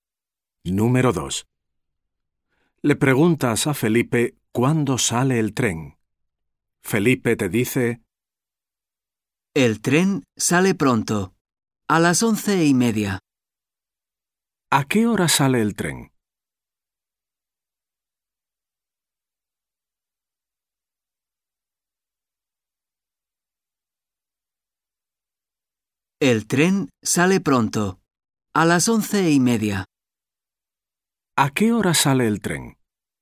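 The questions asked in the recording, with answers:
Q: ¿A qué hora sale el tren?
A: A las 11:30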